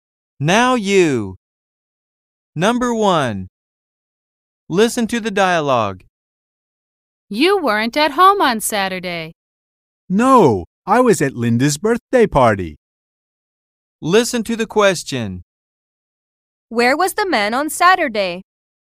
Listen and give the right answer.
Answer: He was at a birthday party.